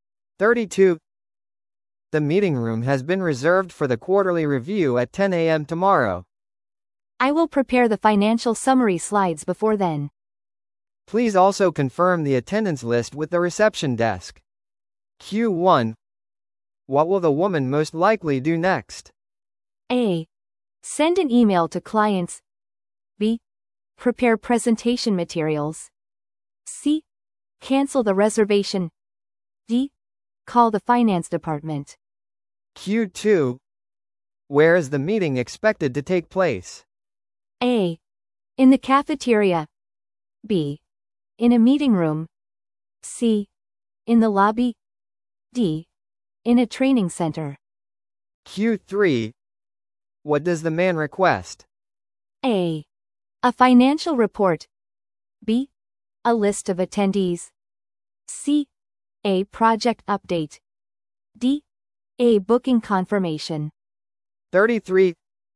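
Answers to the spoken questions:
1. B: Prepare presentation materials.
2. B: In a meeting room.
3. B: A list of attendees.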